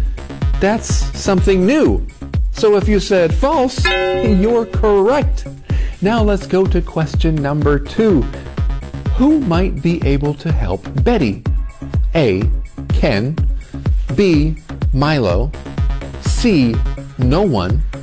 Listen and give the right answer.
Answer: If you chose B, Milo, you got the answer right.